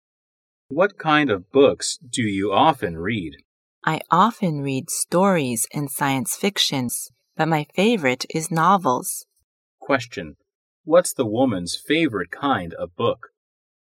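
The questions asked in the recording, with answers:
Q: What's the woman's favorite kind of book?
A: Novels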